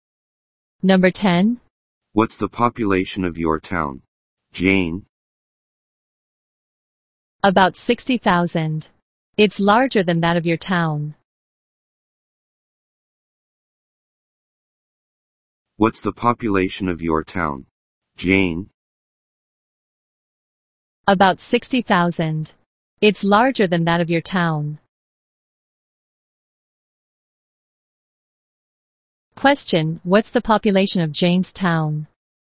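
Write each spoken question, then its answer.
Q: Question, what's the population of Jane's town?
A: About 60,000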